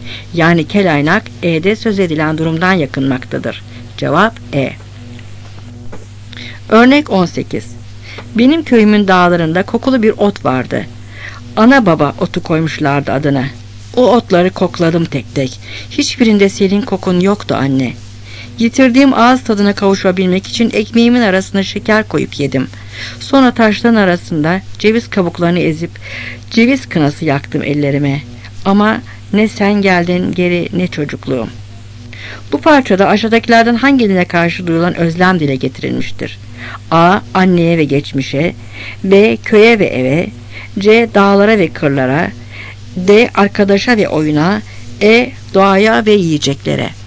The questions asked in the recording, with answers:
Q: Bu parçada aşağıdakilerden hangisine karşı duyulan özlem dile getirilmiştir?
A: Cevap A.